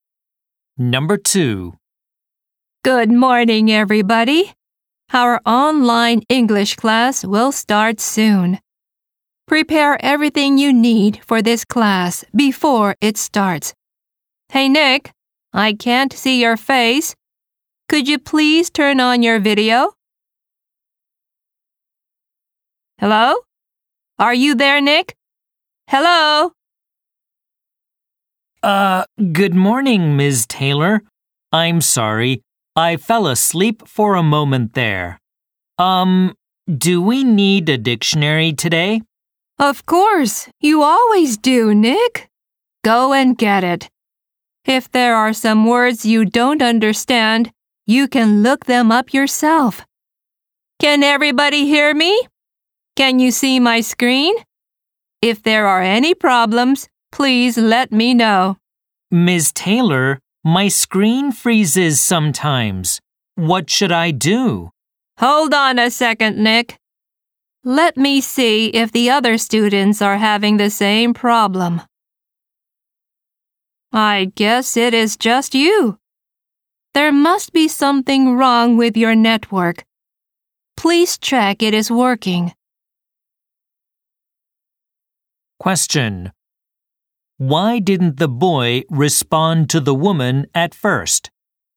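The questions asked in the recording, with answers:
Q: Why didn't the boy respond to the woman at first?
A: He fell asleep for a moment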